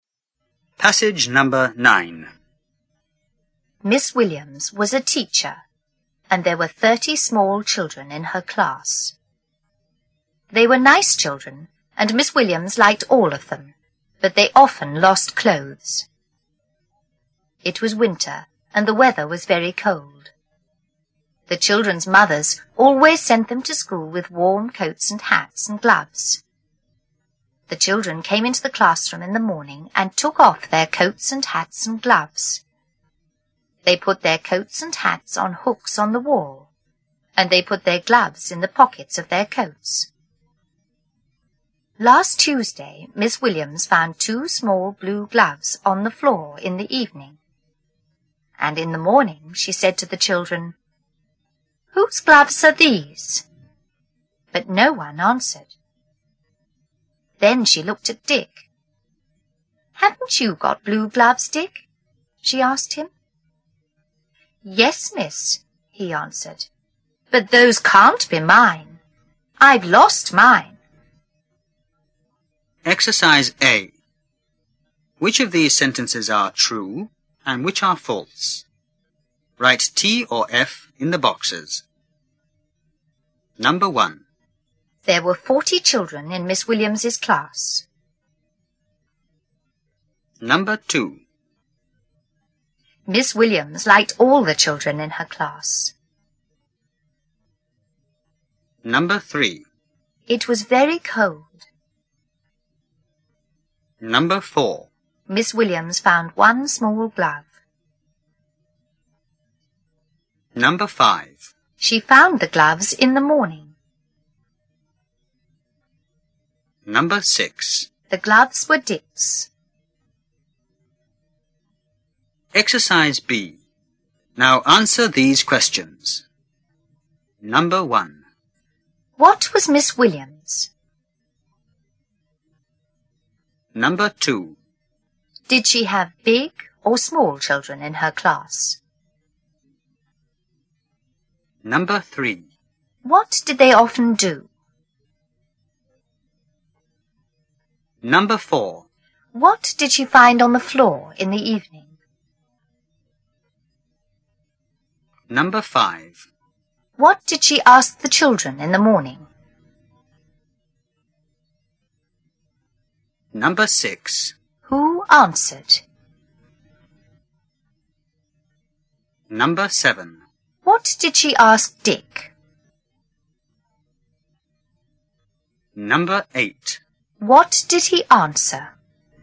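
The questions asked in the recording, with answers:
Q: There were 40 children in Miss Williams's class.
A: False

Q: Miss Williams liked all the children in her class.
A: True

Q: It was very cold.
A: True

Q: Miss Williams found 1 small glove.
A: False

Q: She found the gloves in the morning.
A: False

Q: What was Miss Williams?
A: A teacher

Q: Did she have big or small children in her class?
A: Small children

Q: What did they often do?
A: They often lost clothes

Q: What did she find on the floor in the evening?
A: Two small blue gloves

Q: What did she ask the children in the morning?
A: "Whose gloves are these?"

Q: Who answered?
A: No one

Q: What did she ask Dick?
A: "Haven't you got blue gloves, Dick?"

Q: What did he answer?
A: "Yes, miss, but those can't be mine. I've lost mine."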